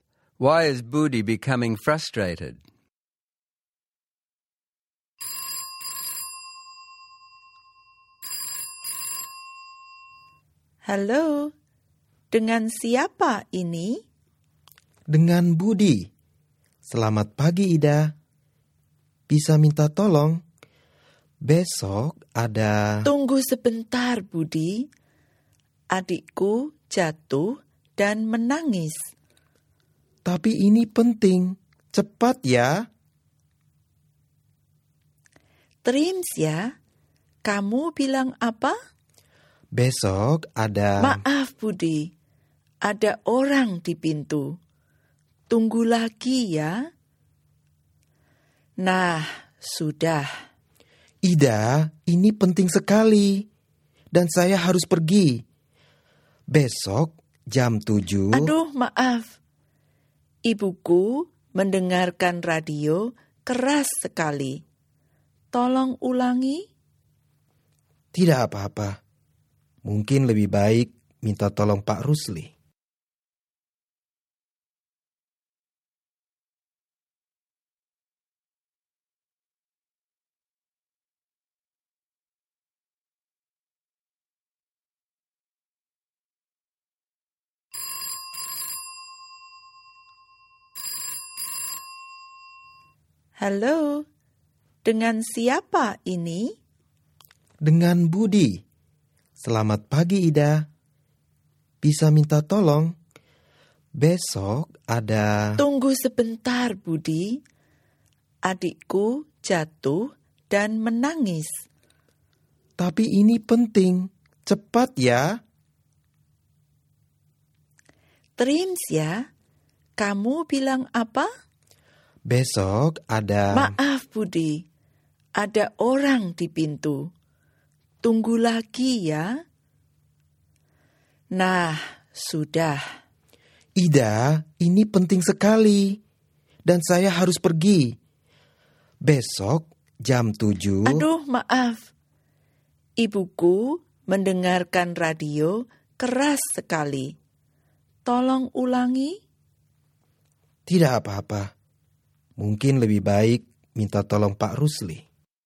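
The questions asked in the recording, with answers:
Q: Why is Budi becoming frustrated?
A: Ida keeps interrupting him (crying sibling, someone at the door, loud radio), so he can't pass on his important message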